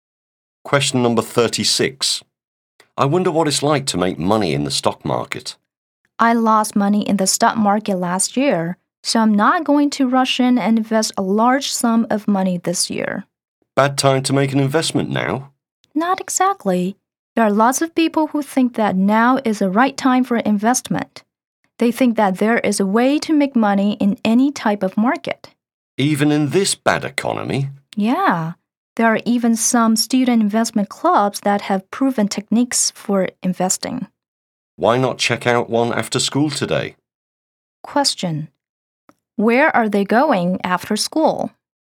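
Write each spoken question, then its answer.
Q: Where are they going after school?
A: To a student investment club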